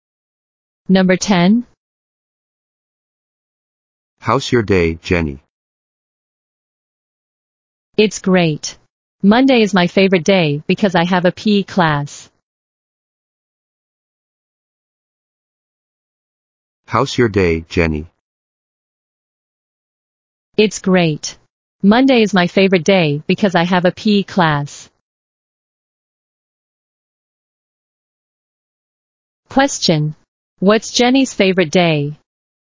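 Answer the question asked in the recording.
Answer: Monday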